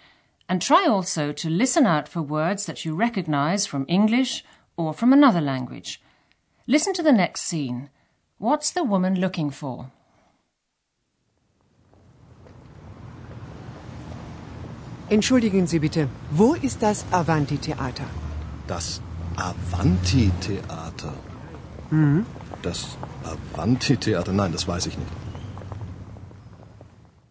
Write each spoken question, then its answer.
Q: What's the woman looking for?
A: She's looking for the Avanti Theater.